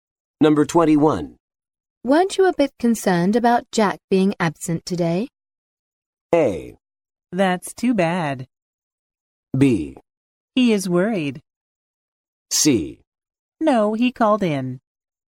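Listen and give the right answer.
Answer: C: No, he called in.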